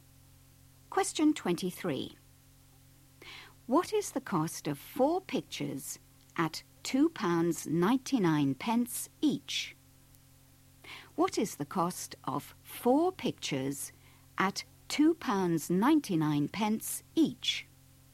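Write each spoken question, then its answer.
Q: What is the cost of 4 pictures at £2.99 each?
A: £11.96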